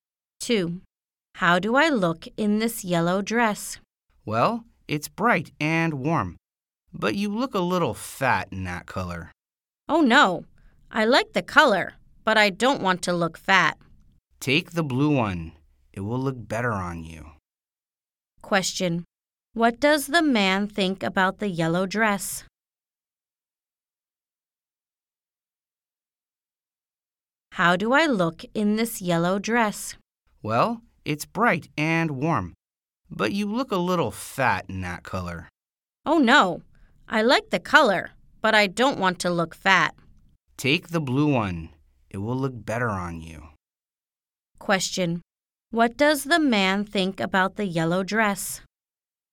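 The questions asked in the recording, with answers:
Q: Question. What does the man think about the yellow dress?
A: It's bright and warm, but she looks a little fat in it.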